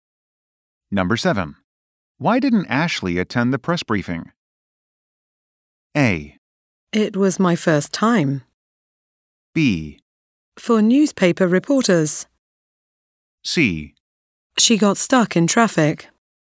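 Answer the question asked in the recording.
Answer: C: She got stuck in traffic.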